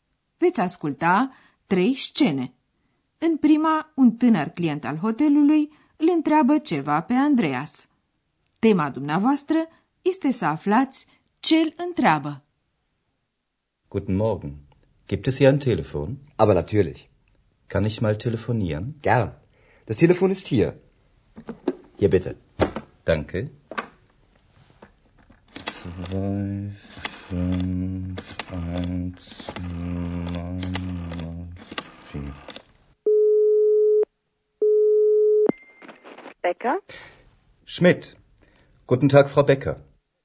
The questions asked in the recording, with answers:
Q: Tema dumneavoastră este să aflați ce îl întreabă.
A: Ați înțeles probabil că tânărul vrea să telefoneze.